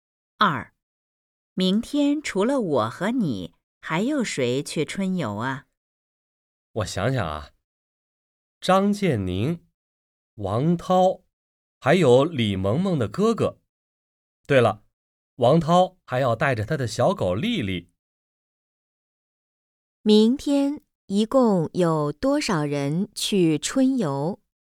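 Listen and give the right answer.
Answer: 五个人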